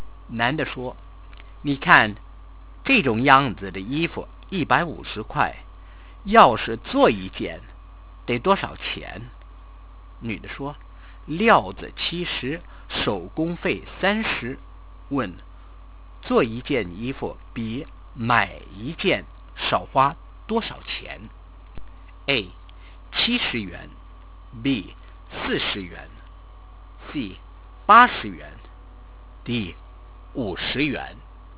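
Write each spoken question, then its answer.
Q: 做一件衣服比买一件少花多少钱?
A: D: 50元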